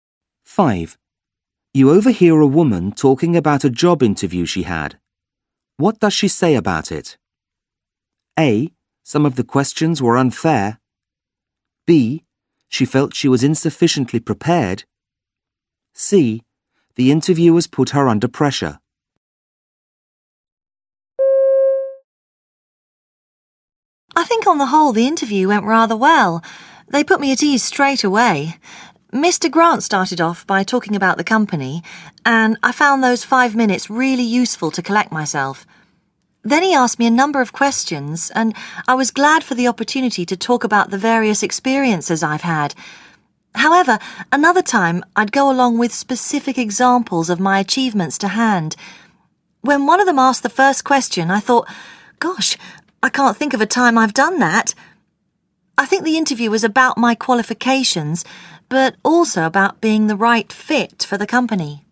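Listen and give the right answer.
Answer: B: She felt she was insufficiently prepared.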